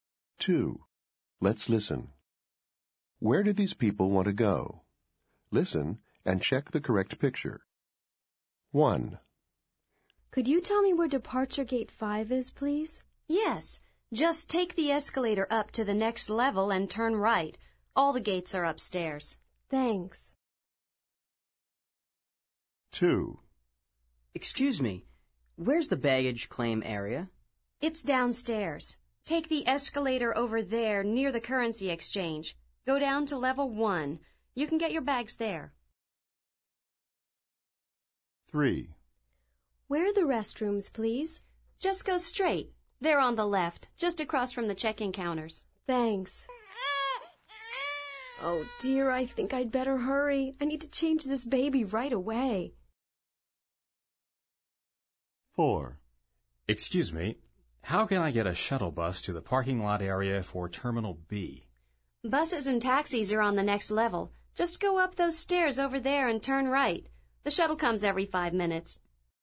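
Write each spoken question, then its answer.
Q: Where do these people want to go?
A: Departure Gate 5

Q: Where do these people want to go?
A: The baggage claim area

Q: Where do these people want to go?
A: The restrooms

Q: Where do these people want to go?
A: The shuttle bus to the Terminal B parking lot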